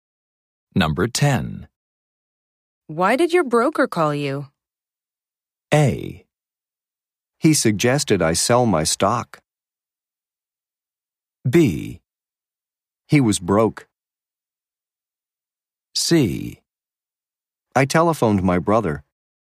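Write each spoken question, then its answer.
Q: Why did your broker call you?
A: A: He suggested I sell my stock.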